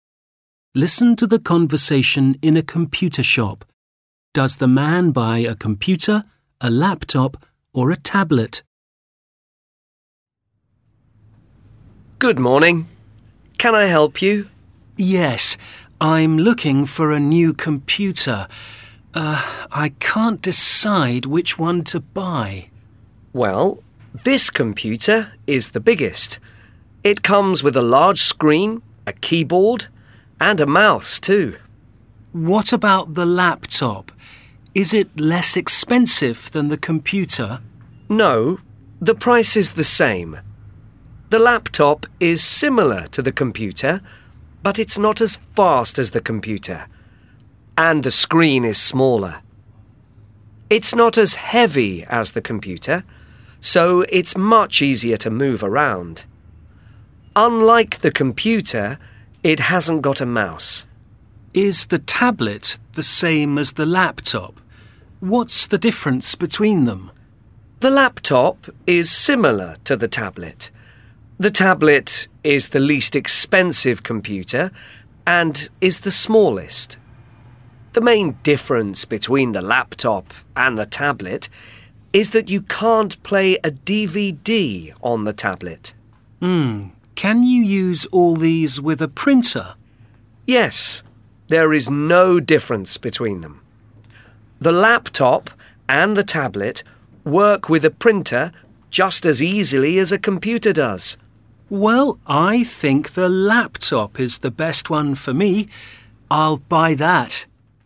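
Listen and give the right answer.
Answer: a laptop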